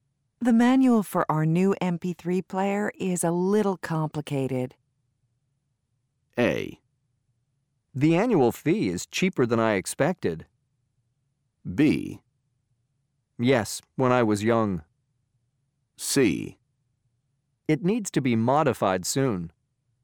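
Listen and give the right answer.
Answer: C: It needs to be modified soon.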